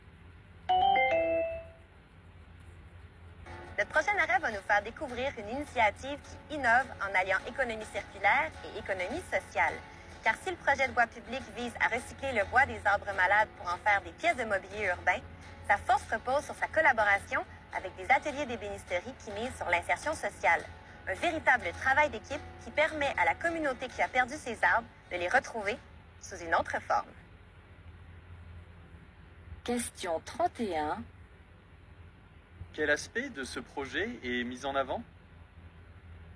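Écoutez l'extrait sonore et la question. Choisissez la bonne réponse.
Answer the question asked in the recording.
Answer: La collaboration avec des ateliers d'insertion sociale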